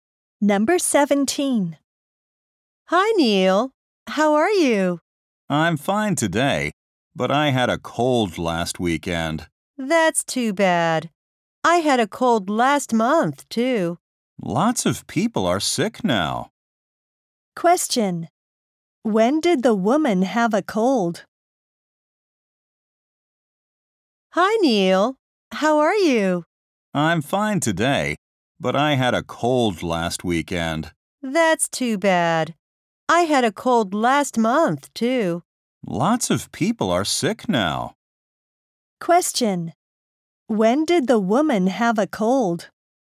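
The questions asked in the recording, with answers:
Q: When did the woman have a cold?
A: Last month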